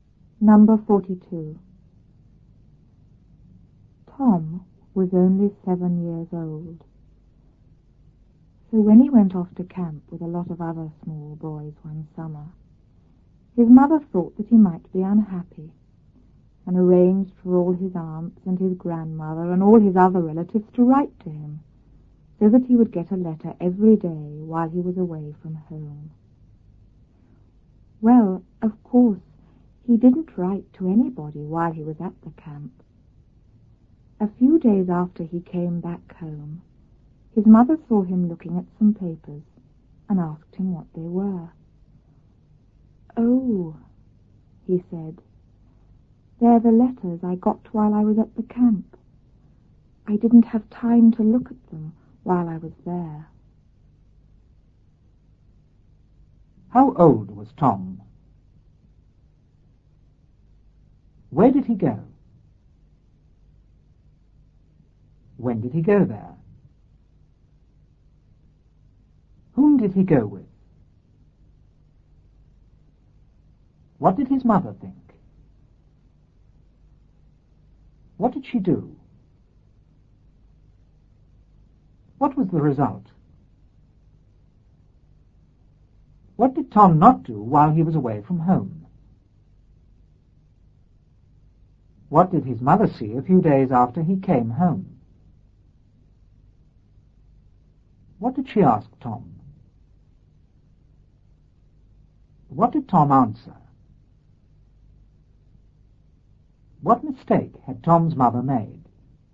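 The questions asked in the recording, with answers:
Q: How old was Tom?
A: 7 years old

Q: Where did he go?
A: To camp

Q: When did he go there?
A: One summer

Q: Whom did he go with?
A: A lot of other small boys

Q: What did his mother think?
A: That he might be unhappy

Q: What did she do?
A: Arranged for his relatives to write to him every day

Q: What was the result?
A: He got a letter every day

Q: What did Tom not do while he was away from home?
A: He didn't write to anybody (or read his letters)

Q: What did his mother see a few days after he came home?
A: Him looking at some papers

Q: What did she ask Tom?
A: What the papers were

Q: What did Tom answer?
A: They were the letters he got at camp; he hadn't had time to look at them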